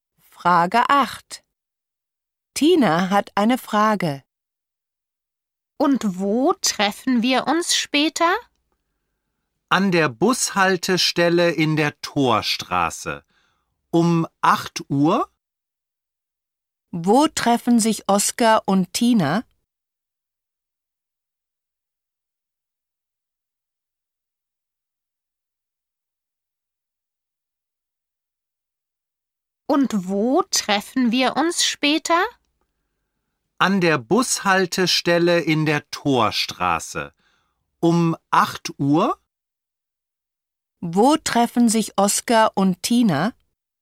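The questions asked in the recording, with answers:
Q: Wo treffen sich Oskar und Tina?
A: An der Bushaltestelle in der Torstraße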